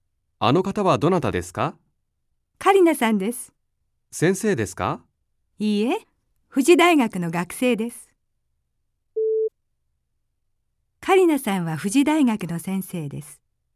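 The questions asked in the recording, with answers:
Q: カリナさんは富士大学の先生です。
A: ×(富士大学の学生です)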